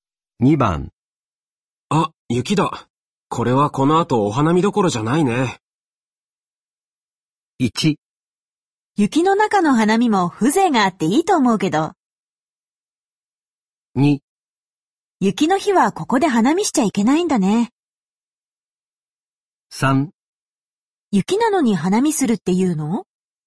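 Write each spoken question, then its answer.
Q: あ、雪だ。これはこの後お花見どころじゃないね。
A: 1: 雪の中の花見も風情があっていいと思うけど。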